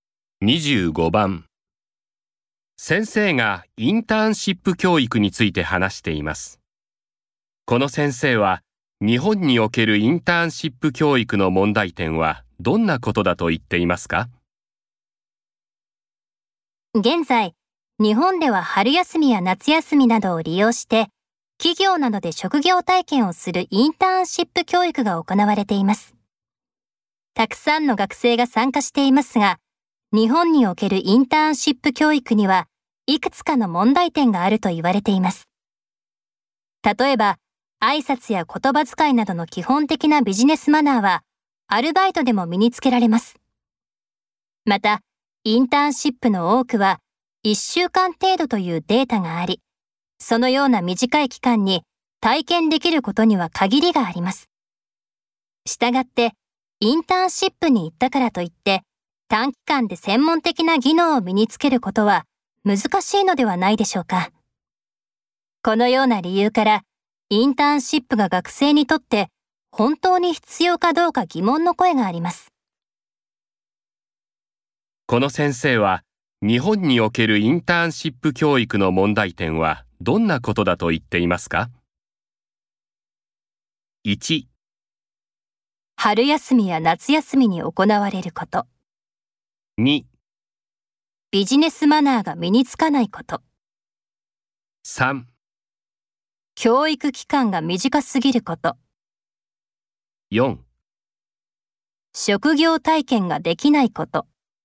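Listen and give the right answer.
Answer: 3: 教育期間が短すぎること。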